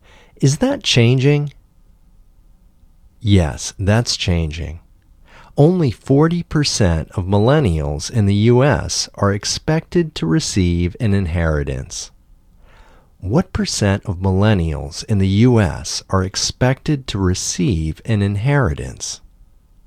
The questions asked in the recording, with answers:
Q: What percent of millennials in the U.S. are expected to receive an inheritance?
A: Only 40% of millennials in the U.S.